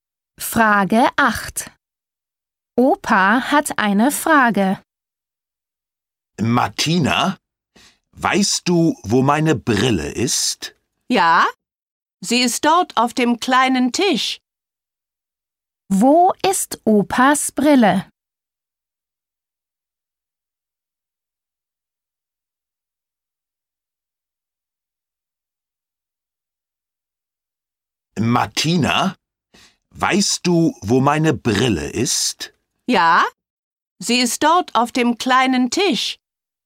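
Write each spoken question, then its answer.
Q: Wo ist Opas Brille?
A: Auf dem kleinen Tisch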